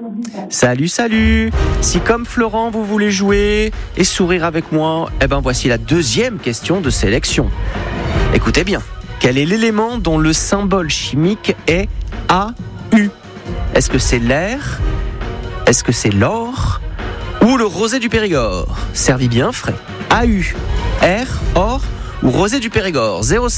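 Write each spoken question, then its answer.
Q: Quel est l'élément dont le symbole chimique est AU?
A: l'or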